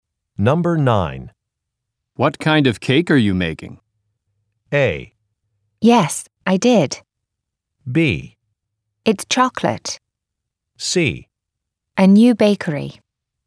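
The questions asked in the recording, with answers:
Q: What kind of cake are you making?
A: B: It's chocolate.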